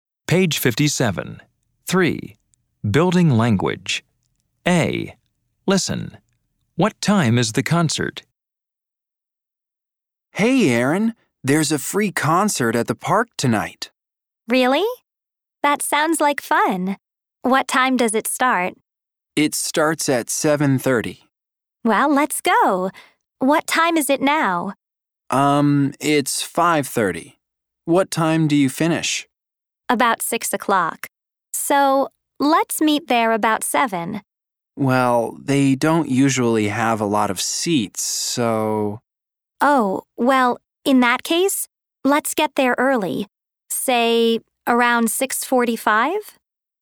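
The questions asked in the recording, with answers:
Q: What time is the concert?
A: 7:30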